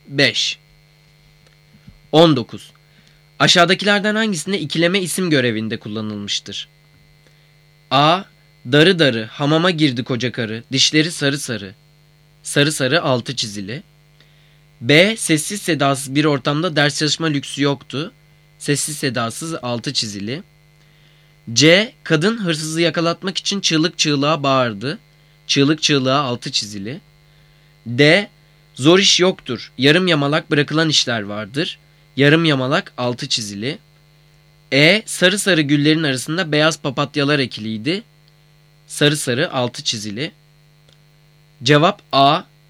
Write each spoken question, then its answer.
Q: Aşağıdakilerden hangisinde ikileme isim görevinde kullanılmıştır?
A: Cevap A.